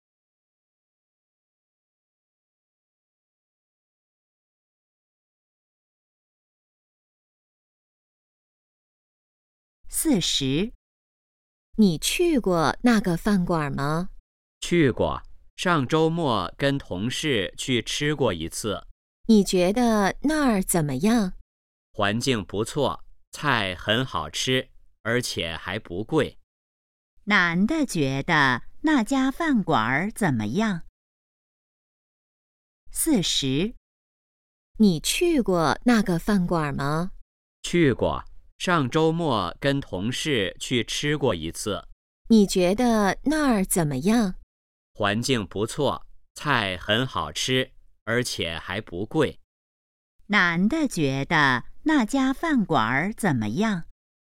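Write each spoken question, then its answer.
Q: 男的觉得那家饭馆怎么样?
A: 环境不错,菜好吃,还不贵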